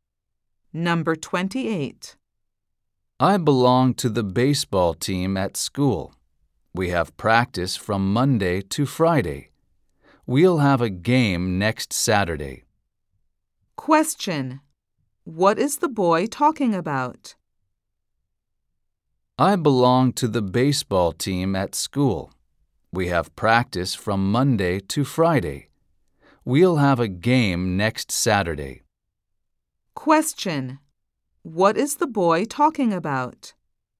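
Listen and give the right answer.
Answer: His school baseball team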